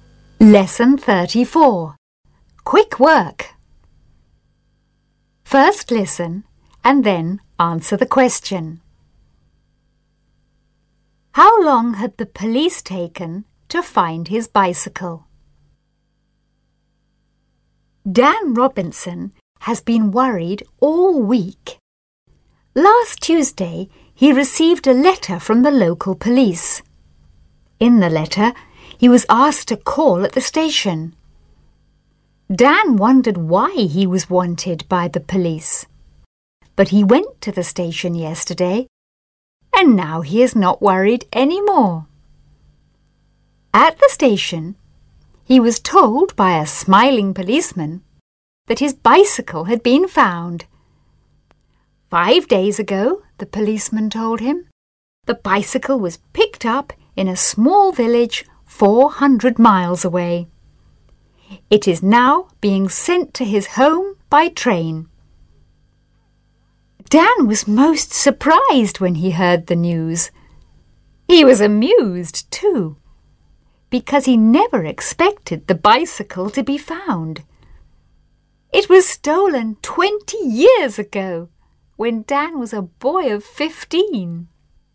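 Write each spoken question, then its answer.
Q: How long had the police taken to find his bicycle?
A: About 20 years (it was stolen 20 years ago)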